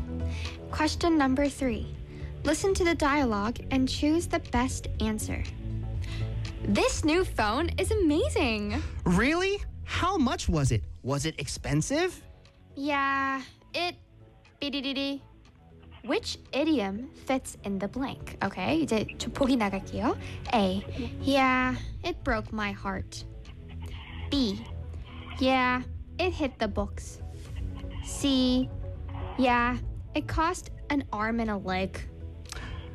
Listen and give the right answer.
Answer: It cost a arm and a leg. C가 맞는 것 같아요.